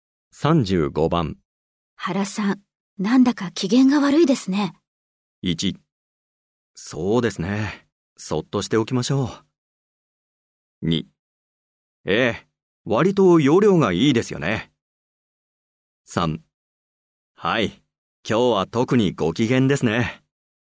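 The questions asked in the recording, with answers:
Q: 原さん、なんだか機嫌が悪いですね。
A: 1: そうですね。そっとしておきましょう。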